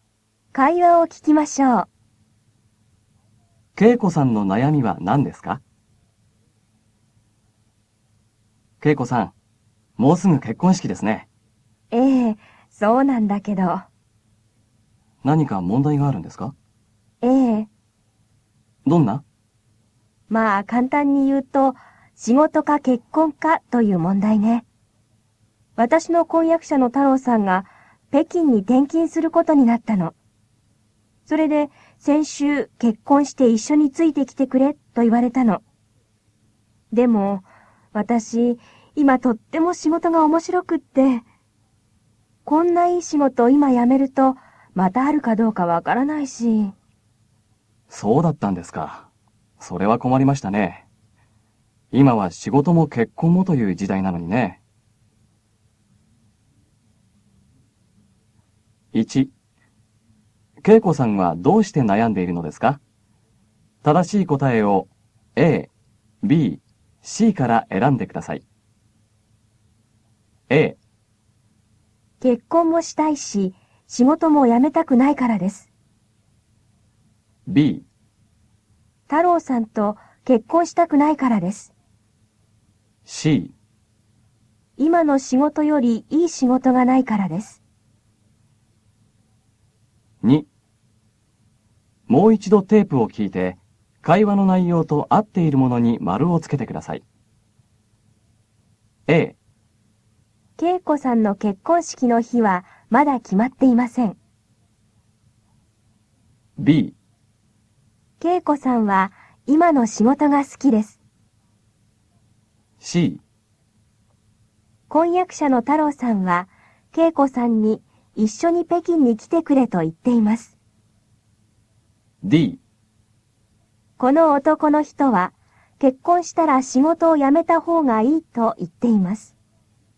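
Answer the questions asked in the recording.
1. A: 結婚もしたいし、仕事も辞めたくないからです。
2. B: 恵子さんは今の仕事が好きです。 C: 婚約者の太郎さんは恵子さんに一緒に北京に来てくれと言っています。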